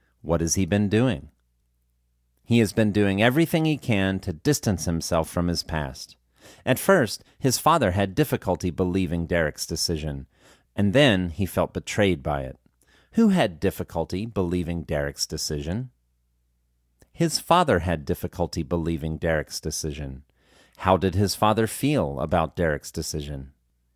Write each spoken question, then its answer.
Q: Who had difficulty believing Derek's decision?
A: His father had difficulty believing Derek's decision.

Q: How did his father feel about Derek's decision?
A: His father felt betrayed by Derek's decision.